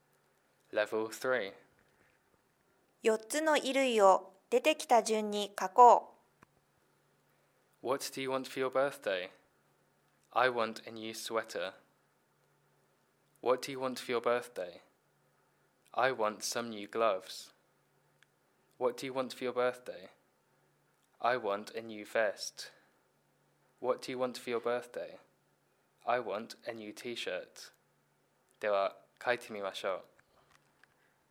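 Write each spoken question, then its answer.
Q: 4つの衣類を出てきた順に書こう。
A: sweater, gloves, vest, t-shirt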